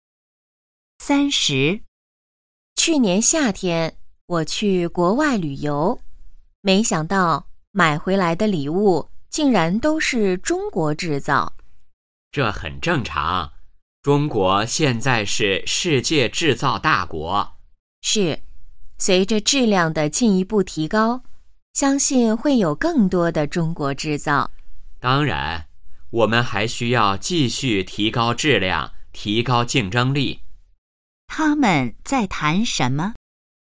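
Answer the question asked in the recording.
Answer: 中国制造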